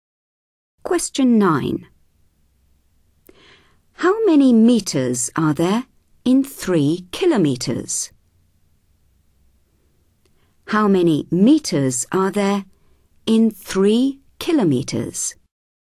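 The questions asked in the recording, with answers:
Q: How many meters are there in 3 kilometers?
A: 3000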